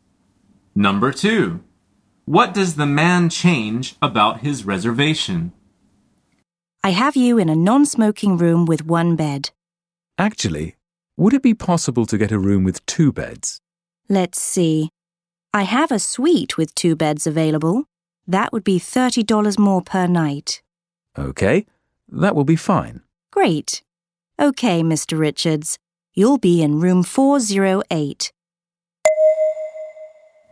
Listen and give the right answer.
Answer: The answer is the number of beds.